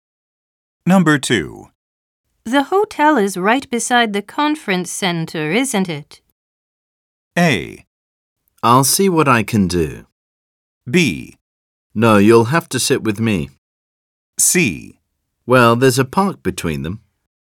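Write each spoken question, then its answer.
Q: The hotel is right beside the conference center, isn't it?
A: C: Well, there's a park between them.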